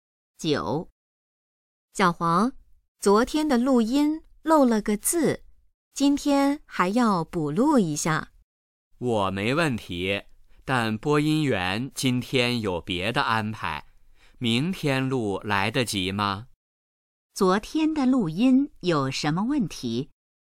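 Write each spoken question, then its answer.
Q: 昨天的录音有什么问题?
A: 漏了个字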